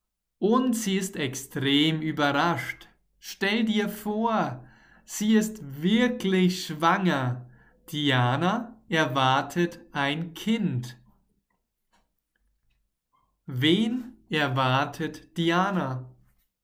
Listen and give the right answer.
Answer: Nein, ein Kind.